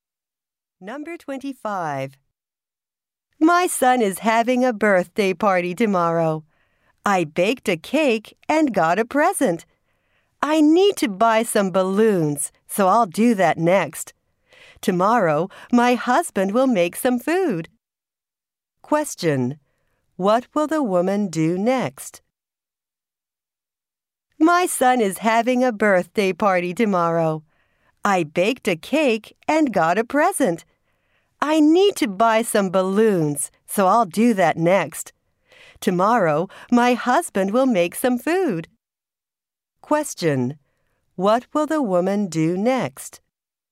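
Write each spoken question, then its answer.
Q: What will the woman do next?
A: Buy some balloons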